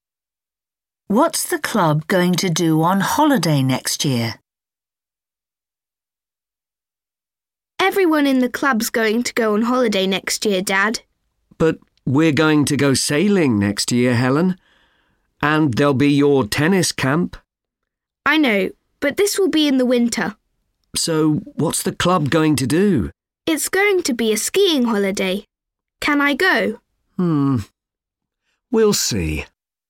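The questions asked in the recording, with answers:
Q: What's the club going to do on holiday next year?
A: go skiing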